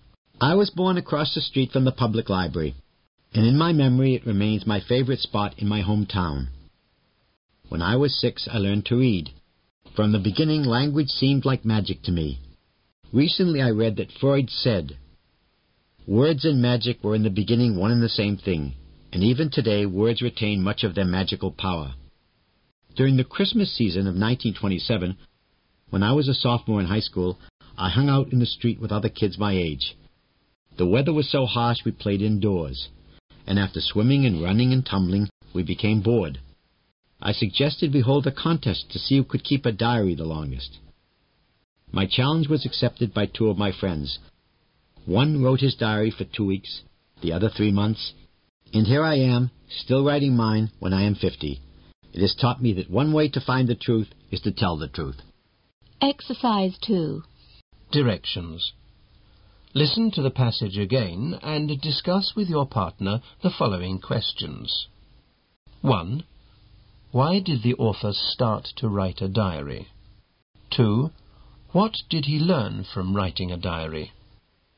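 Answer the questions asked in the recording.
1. He suggested a contest with friends to see who could keep a diary the longest, because they were bored.
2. That one way to find the truth is to tell the truth.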